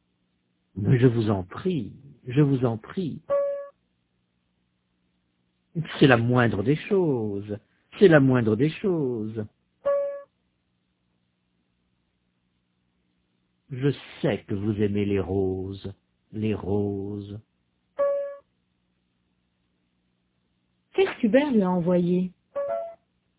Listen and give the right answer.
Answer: Des roses.